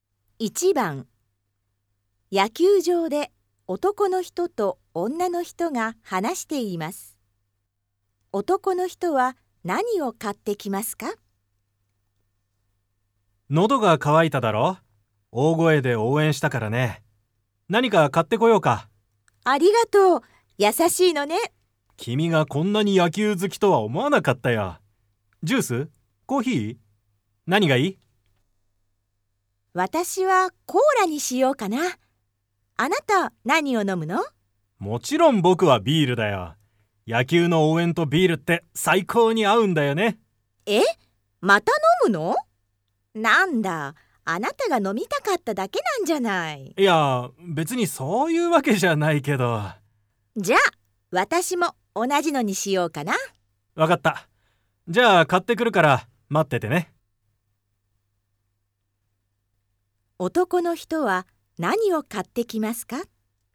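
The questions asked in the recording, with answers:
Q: 男の人は何を買ってきますか?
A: ビール二つ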